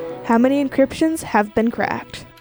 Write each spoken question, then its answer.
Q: How many encryptions have been cracked?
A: Three out of the four Cryptos inscriptions have been cracked.